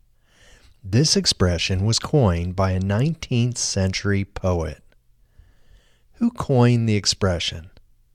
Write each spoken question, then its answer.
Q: Who coined the expression?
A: A 19th century poet coined the expression.